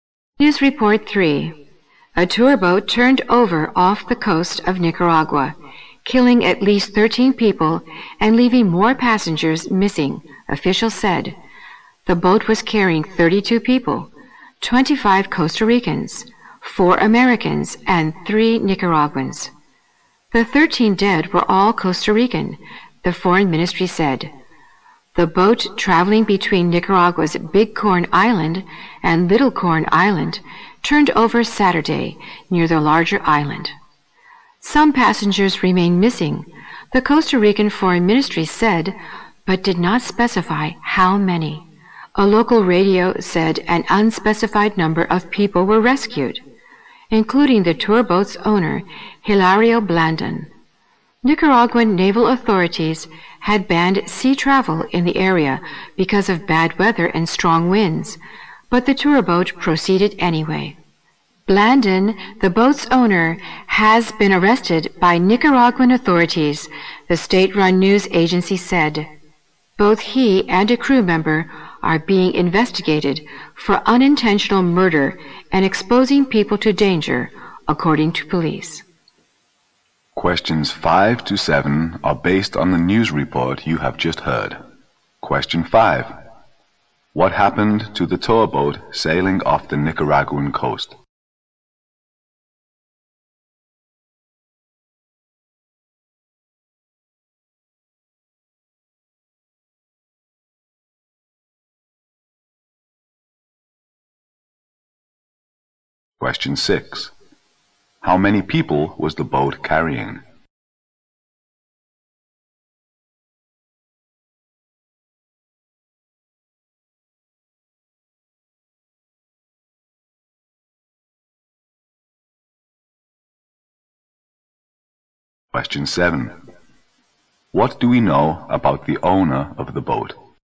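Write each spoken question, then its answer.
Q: What happened to the tour boat sailing off the Nicaraguan coast?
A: It turned over

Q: How many people was the boat carrying?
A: 32

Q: What do we know about the owner of the boat?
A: He was rescued and then arrested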